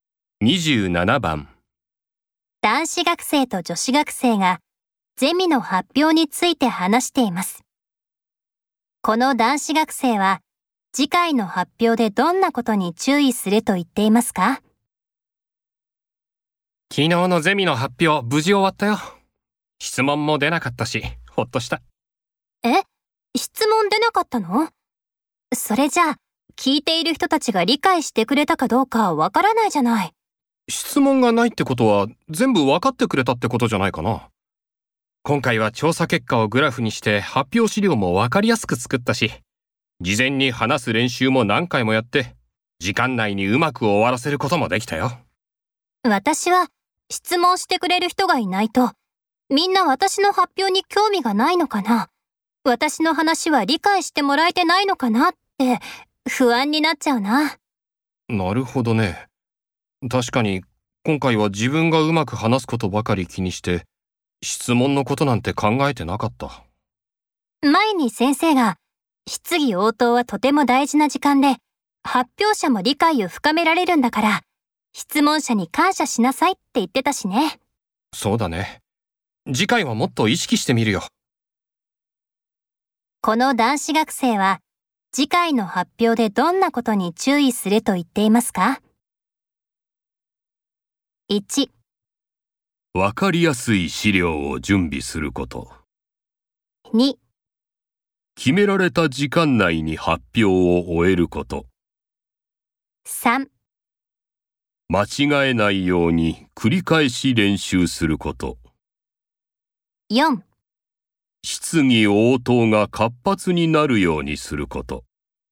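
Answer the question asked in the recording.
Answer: 4: 質疑応答が活発になるようにすること。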